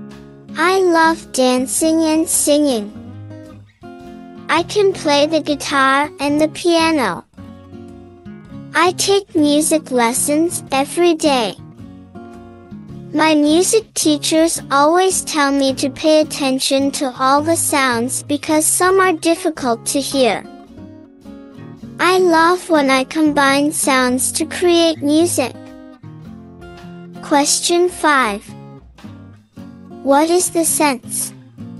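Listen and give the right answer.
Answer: Hearing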